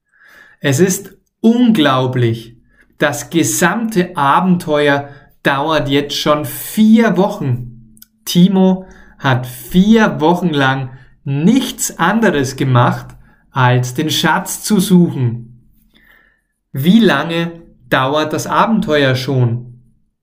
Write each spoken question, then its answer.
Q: Wie lange dauert das Abenteuer schon?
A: 4 Wochen. Das Abenteuer dauert jetzt schon 4 Wochen.